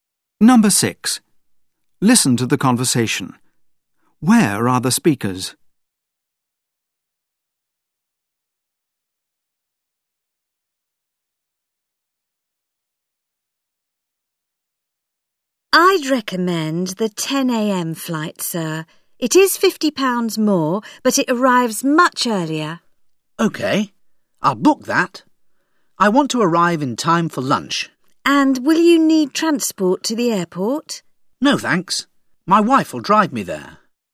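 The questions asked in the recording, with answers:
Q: Where are the speakers?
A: At a travel agent's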